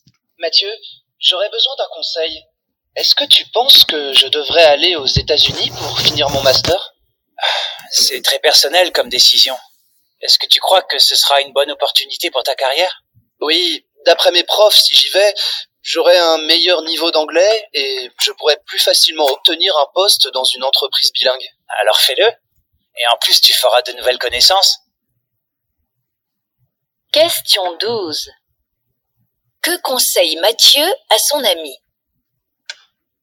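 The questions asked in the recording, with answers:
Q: Que conseille Mathieu à son ami ?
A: D'aller aux États-Unis pour finir son master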